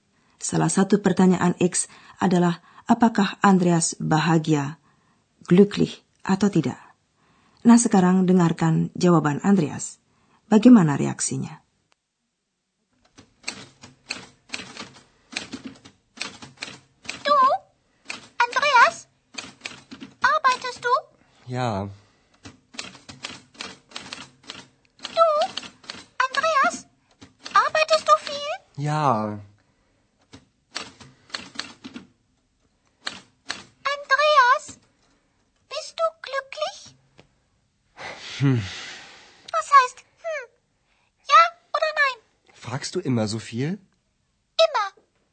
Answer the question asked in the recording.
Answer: Atas pertanyaan X itu, Andreas hanya menggumam tak jelas, lalu malah ganti bertanya.